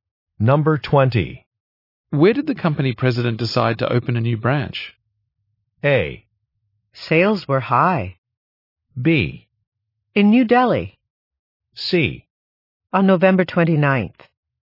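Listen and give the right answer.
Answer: B: In New Delhi.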